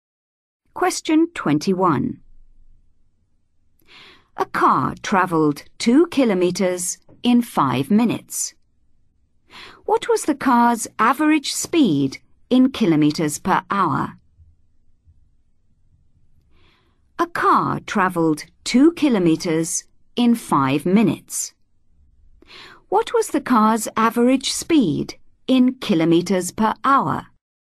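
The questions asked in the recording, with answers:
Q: What was the car's average speed in kilometres per hour?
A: 24 km/h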